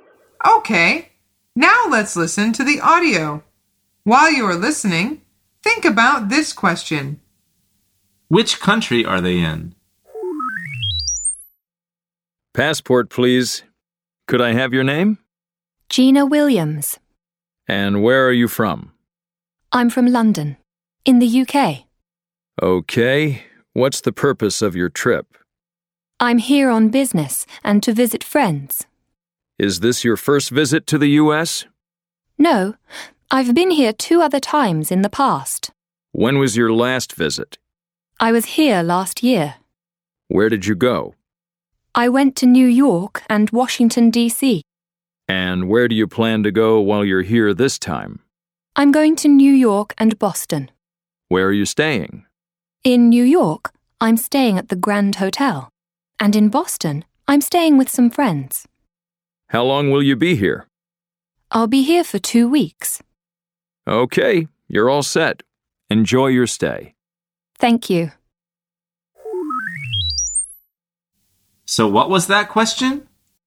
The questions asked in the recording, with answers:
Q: Which country are they in?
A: The answer is the US.